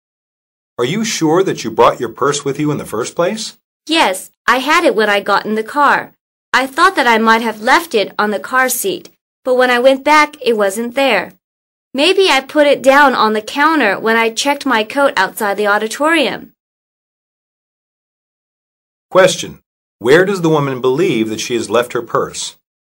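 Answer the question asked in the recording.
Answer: On the counter where she checked her coat outside the auditorium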